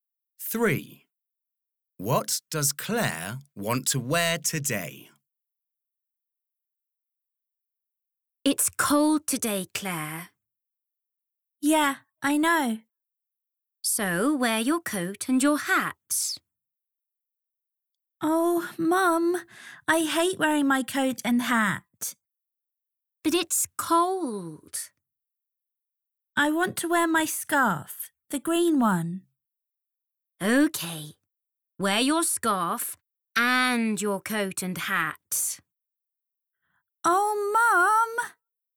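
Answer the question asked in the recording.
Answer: Her green scarf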